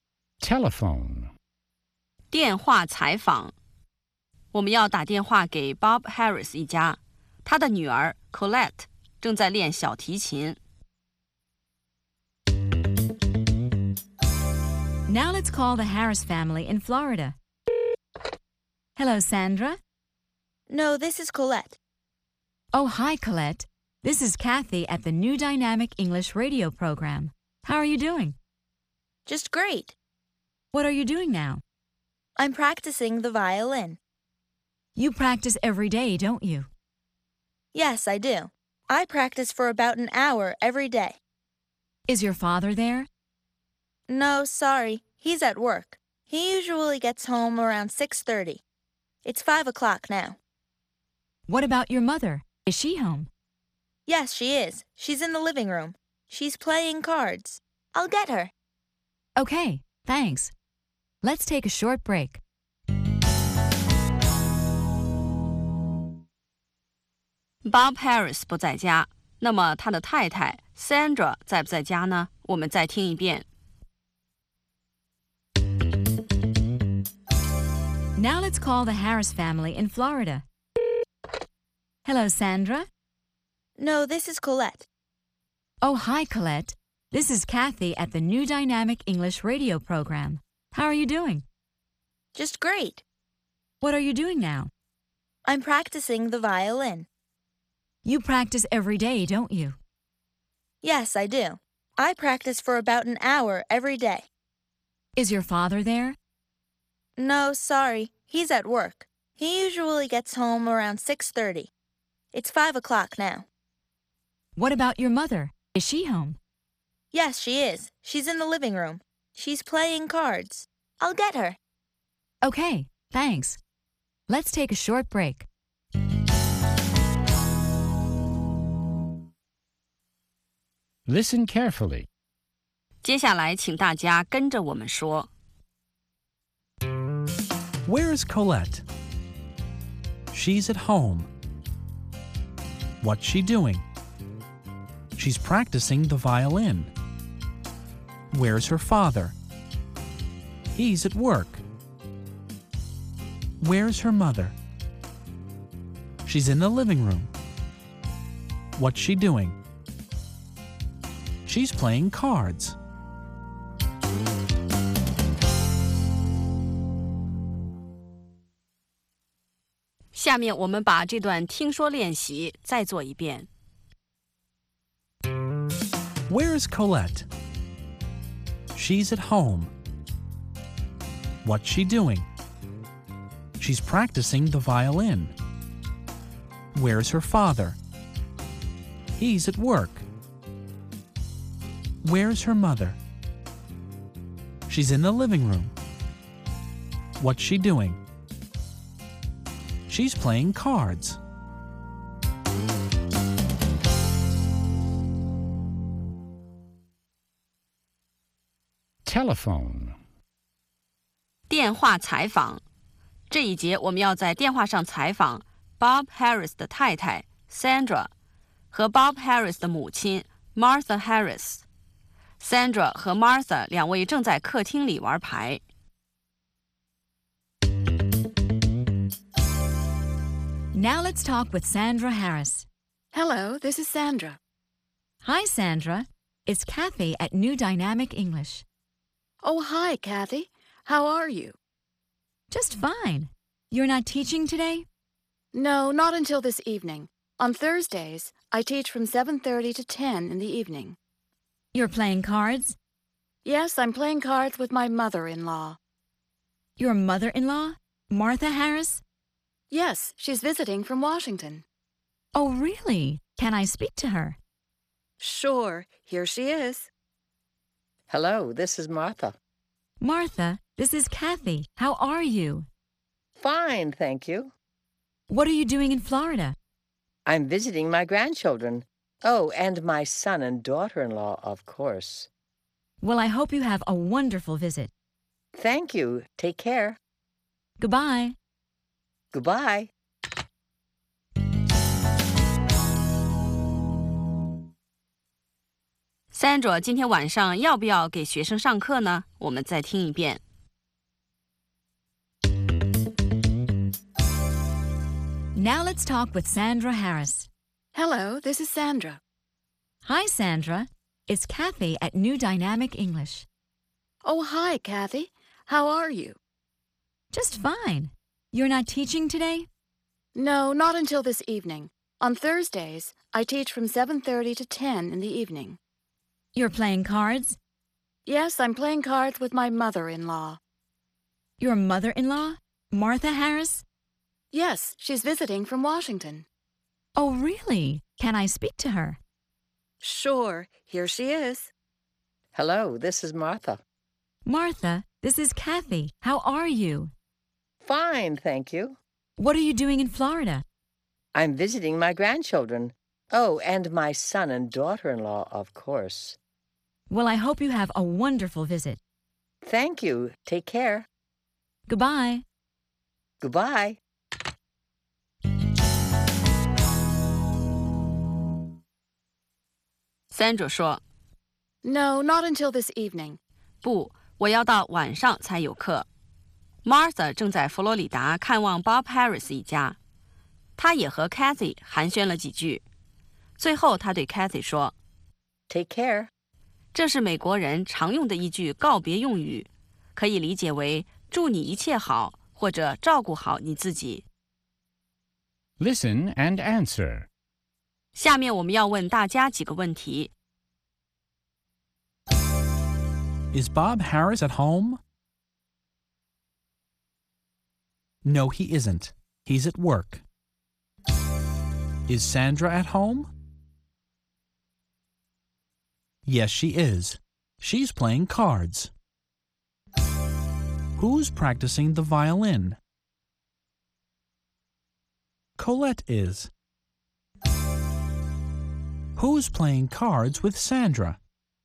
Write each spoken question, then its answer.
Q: Is Bob Harris at home?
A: No, he isn't. He's at work.

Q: Is Sandra at home?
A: Yes, she is. She's playing cards.

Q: Who's practicing the violin?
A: Colette is.

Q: Who's playing cards with Sandra?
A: Martha is. They're playing cards in the living room.